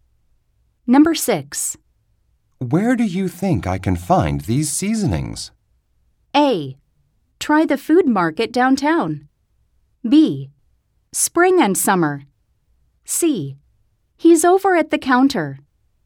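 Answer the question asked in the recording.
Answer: A: Try the food market downtown.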